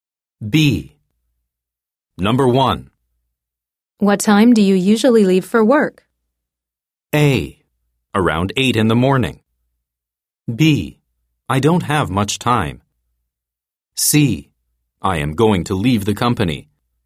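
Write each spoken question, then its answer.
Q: What time do you usually leave for work?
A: A: Around 8 in the morning.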